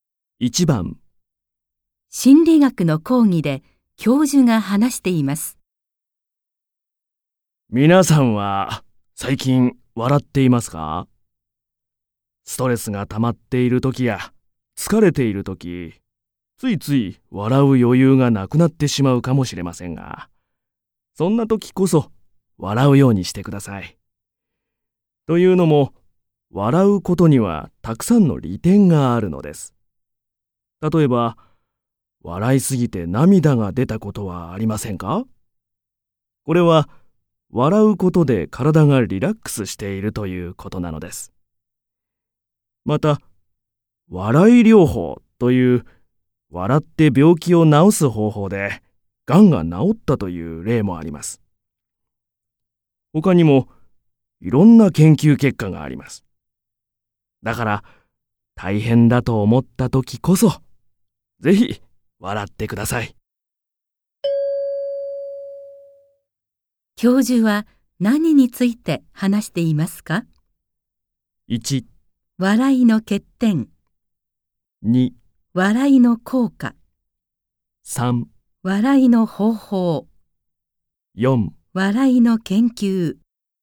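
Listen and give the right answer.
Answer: 2: 笑いの効果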